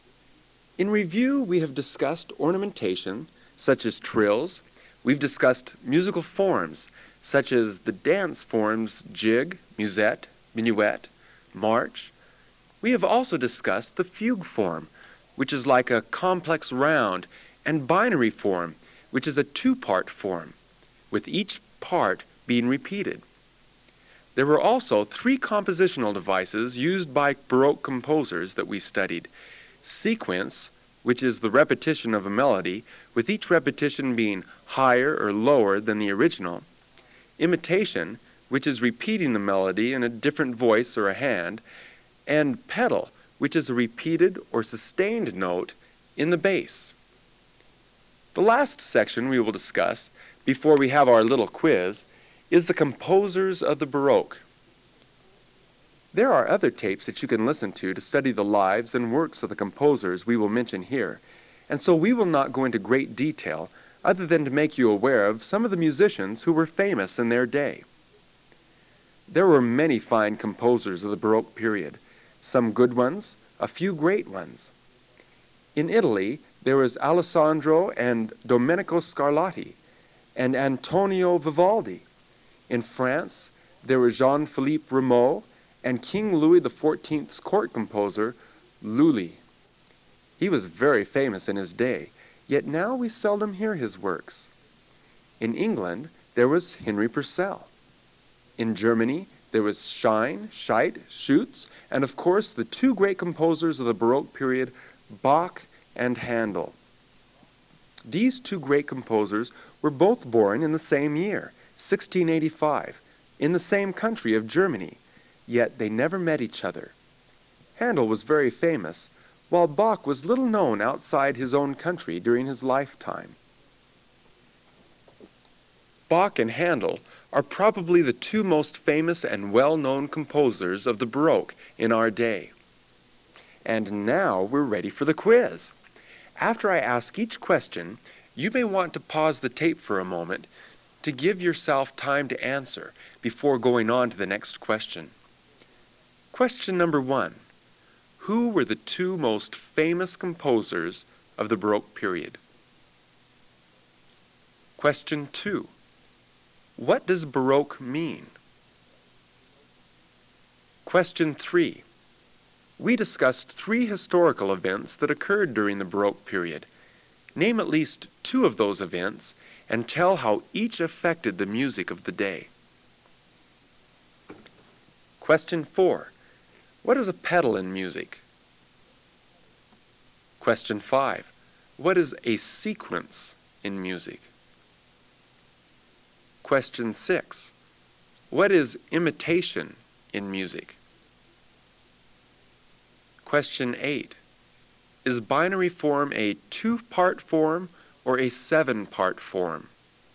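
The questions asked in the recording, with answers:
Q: Who were the two most famous composers of the Baroque period?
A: Bach and Handel

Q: What is a pedal in music?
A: A repeated or sustained note in the bass

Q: What is a sequence in music?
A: The repetition of a melody, each repetition higher or lower than the original

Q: What is imitation in music?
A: Repeating the melody in a different voice or hand

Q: Is binary form a two-part form or a seven-part form?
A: A two-part form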